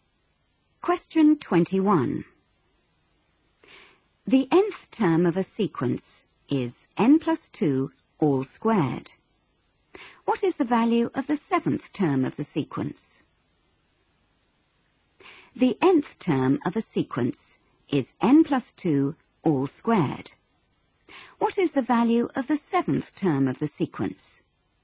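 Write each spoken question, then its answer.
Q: What is the value of the seventh term of the sequence?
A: 81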